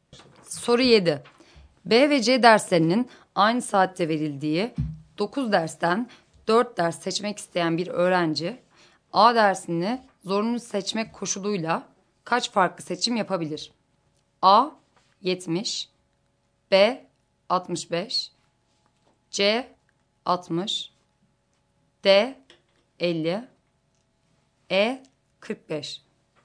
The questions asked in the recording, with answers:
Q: B ve C derslerinin aynı saatte verildiği 9 dersten 4 ders seçmek isteyen bir öğrenci A dersini zorunlu seçmek koşuluyla kaç farklı seçim yapabilir?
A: Doğru cevap D şıkkı.